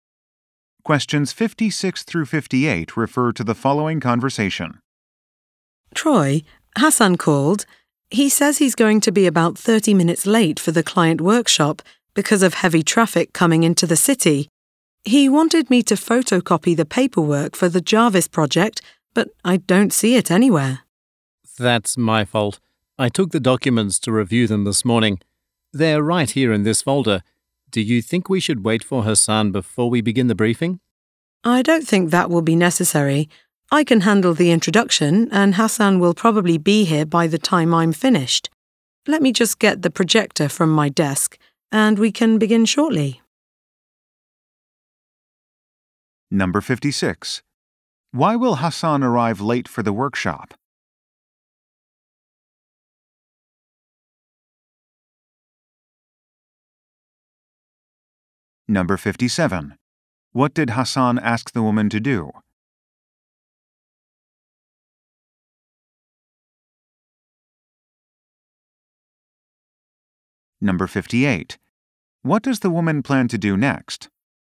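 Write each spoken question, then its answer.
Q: Why will Hassan arrive late for the workshop?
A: Heavy traffic

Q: What did Hassan ask the woman to do?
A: Photocopy the Jarvis project paperwork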